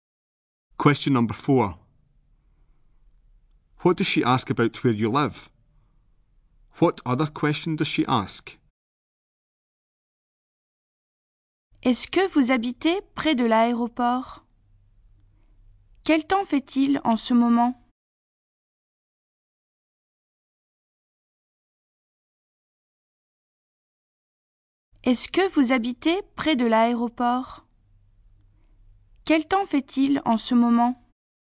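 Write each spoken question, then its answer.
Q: What does she ask about where you live?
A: Whether you live near the airport

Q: What other question does she ask?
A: What the weather is like at the moment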